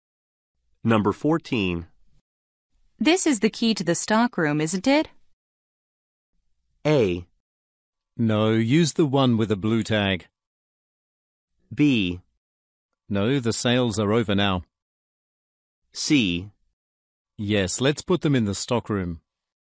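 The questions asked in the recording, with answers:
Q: This is the key to the stock room, isn't it?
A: A: No, use the one with a blue tag.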